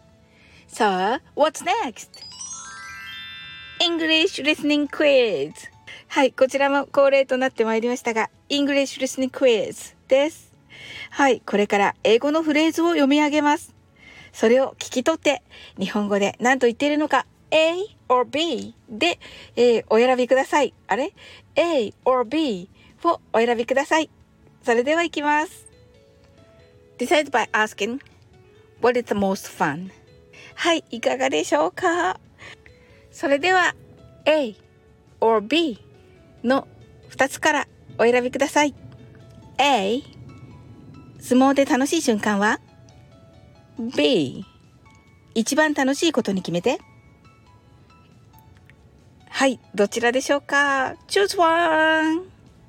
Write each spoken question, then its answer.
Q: Decide by asking, what is the most fun?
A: The answer is B 一番楽しいことに決めてです。